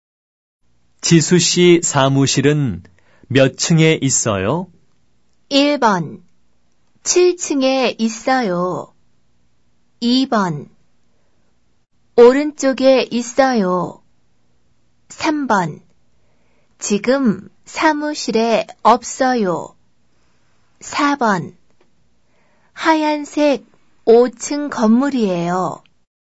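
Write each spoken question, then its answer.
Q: 지수 씨 사무실은 몇 층에 있어요?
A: 1: 7층에 있어요.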